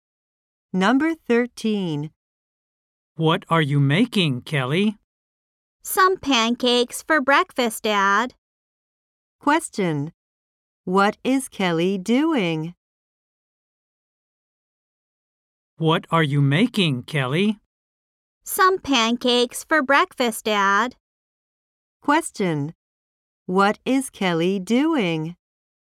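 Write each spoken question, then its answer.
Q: What is Kelly doing?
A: Making pancakes for breakfast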